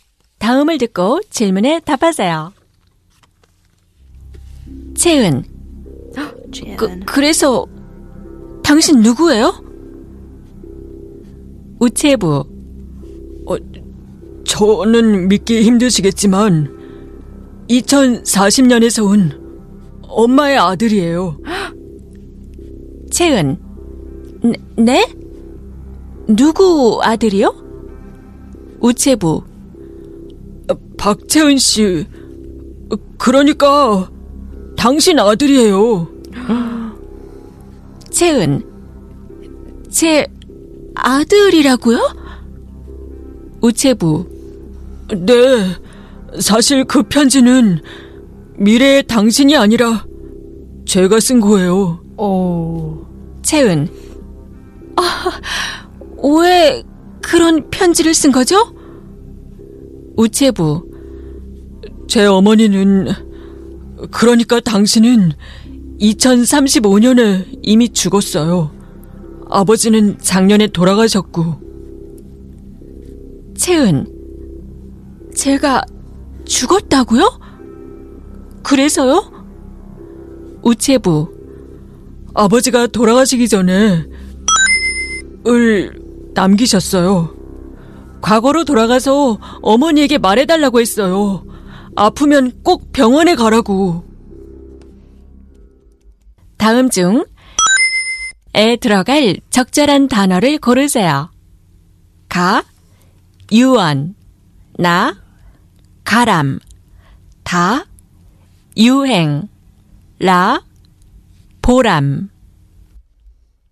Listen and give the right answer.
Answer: The correct answer is you on will.